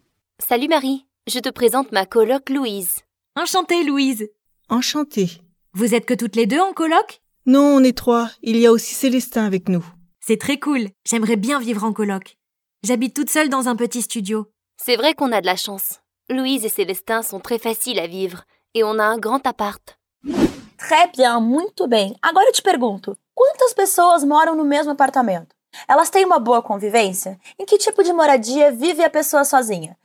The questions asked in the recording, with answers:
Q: quantas pessoas moram no mesmo apartamento?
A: Non, on est trois.

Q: Elas têm une bonne convivência?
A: eles são pessoas fáceis de se lidar, de se viver com, de se conviver.

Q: Em que type de moradia vive a pessoa sozinha?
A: Eu moro sozinha num pequeno estúdio.